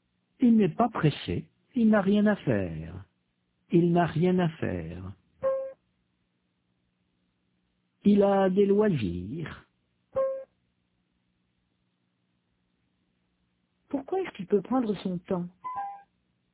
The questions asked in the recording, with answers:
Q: Pourquoi est-ce qu'il peut prendre son temps?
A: Parce qu'il n'est pas pressé, il n'a rien à faire.